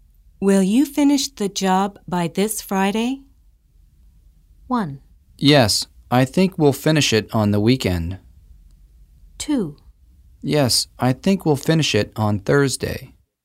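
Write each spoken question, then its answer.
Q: Will you finish the job by this Friday?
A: 2: Yes, I think we'll finish it on Thursday.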